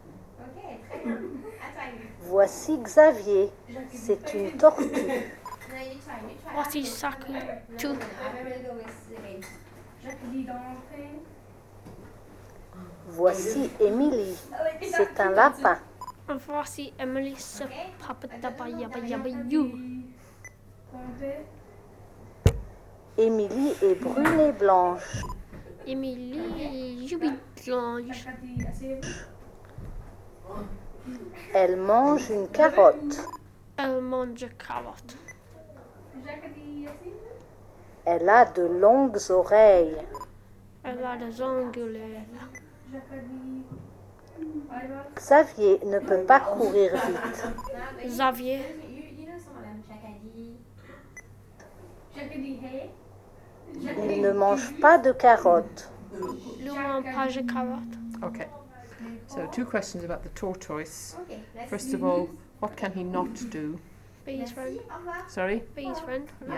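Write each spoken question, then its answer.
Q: what can he not do?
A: Run fast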